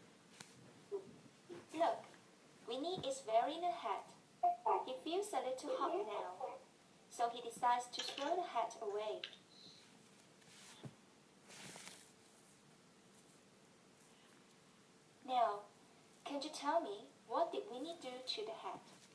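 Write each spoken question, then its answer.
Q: Now, can you tell me, what did Winnie do to the hat?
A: He threw the hat away.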